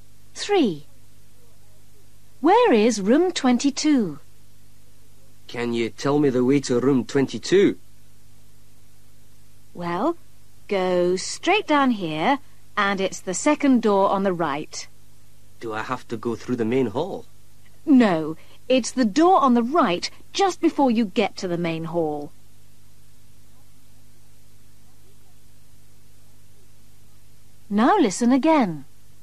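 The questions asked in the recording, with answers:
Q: Where is room 22?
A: The second door on the right, just before the main hall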